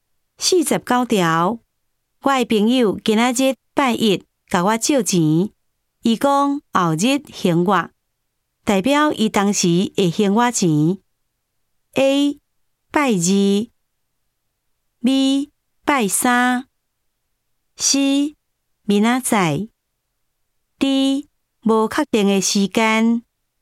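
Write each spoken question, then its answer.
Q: 代表伊当时会还我钱。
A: B: 拜三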